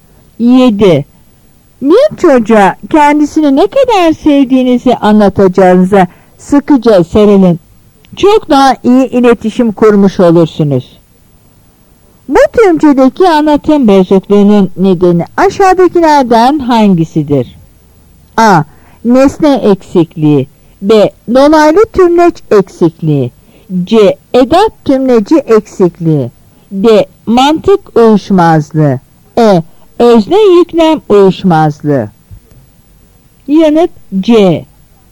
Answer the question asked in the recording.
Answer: Yanıt C.